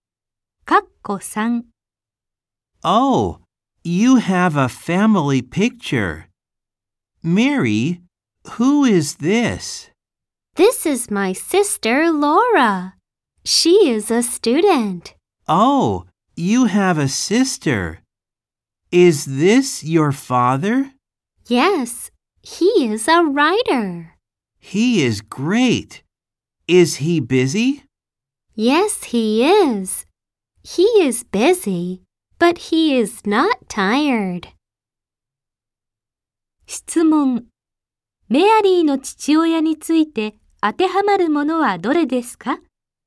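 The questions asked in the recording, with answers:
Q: メアリーの父親について当てはまるものはどれですか?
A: 作家で、忙しいが疲れていない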